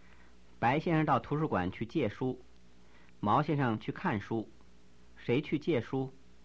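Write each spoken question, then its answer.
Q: 谁去借书?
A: 白先生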